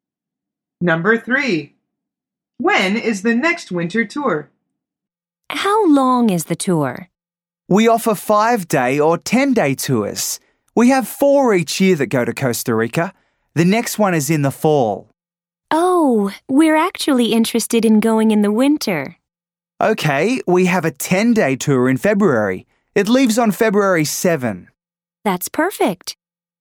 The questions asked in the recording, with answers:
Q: When is the next winter tour?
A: The answer is in February.